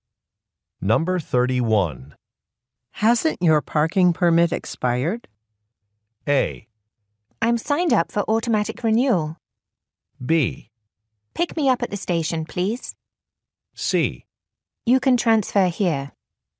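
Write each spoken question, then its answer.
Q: Hasn't your parking permit expired?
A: A: I'm signed up for automatic renewal.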